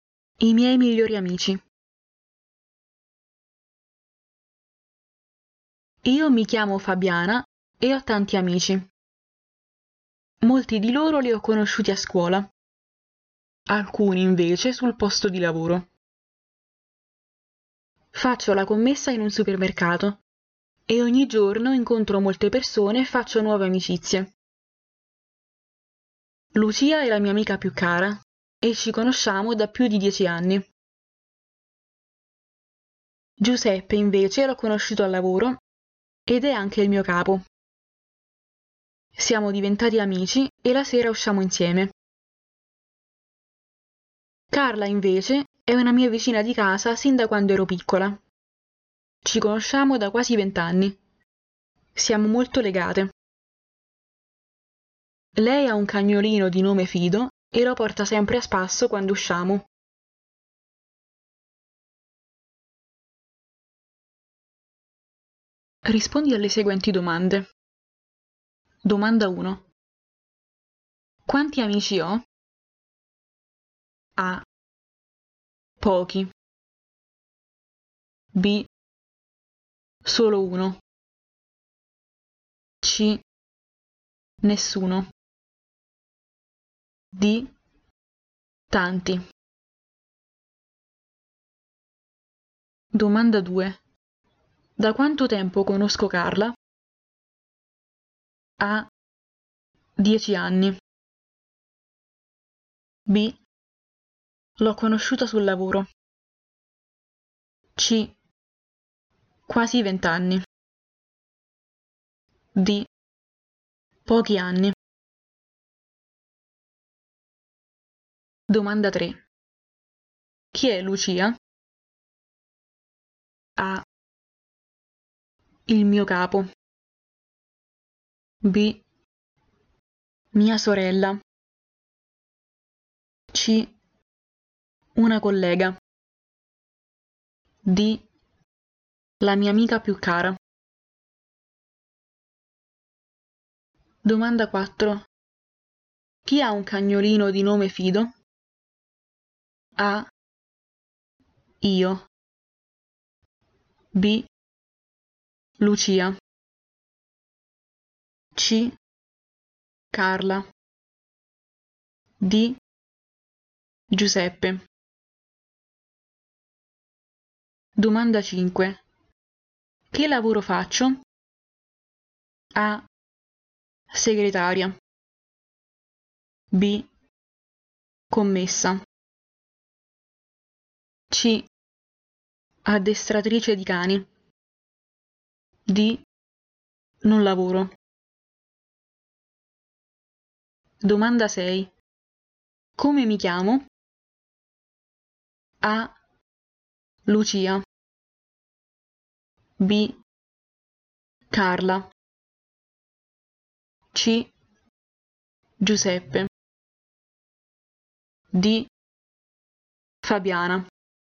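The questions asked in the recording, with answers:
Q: Quanti amici ho?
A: D: Tanti.

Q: Da quanto tempo conosco Carla?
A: C: Quasi 20 anni.

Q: Chi è Lucia?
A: D: La mia amica più cara.

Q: Chi ha un cagnolino di nome Fido?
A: C: Carla.

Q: Che lavoro faccio?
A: B: Commessa.

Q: Come mi chiamo?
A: D: Fabiana.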